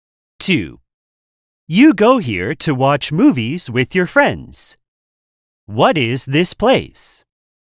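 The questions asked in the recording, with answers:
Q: What is this place?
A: a movie theater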